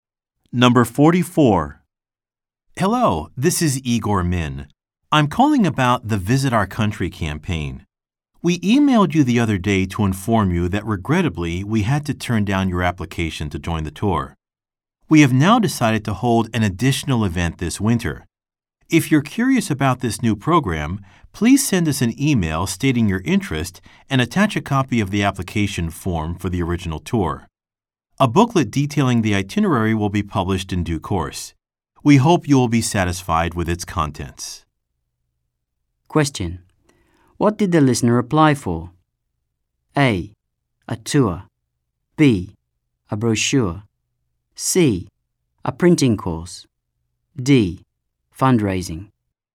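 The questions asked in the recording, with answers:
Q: What did the listener apply for?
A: A: A tour.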